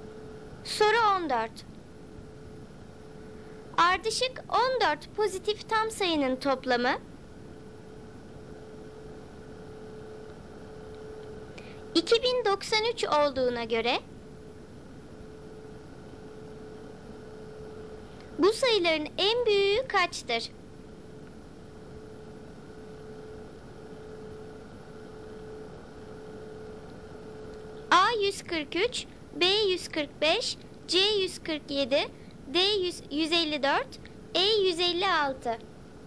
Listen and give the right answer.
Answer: Doğru cevap E 156.